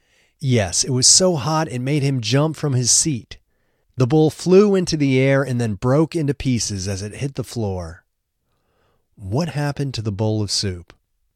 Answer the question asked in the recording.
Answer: The bowl of soup flew into the air and then broke into pieces as it hit the floor.